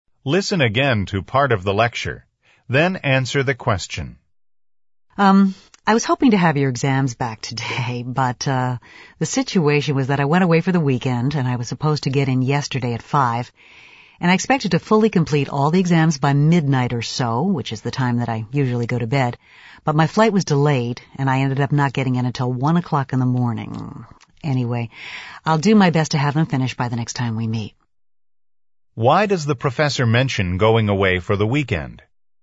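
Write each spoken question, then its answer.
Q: Why does the professor mention going away for the weekend?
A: To explain why he hasn't finished grading the exams: his flight back was delayed.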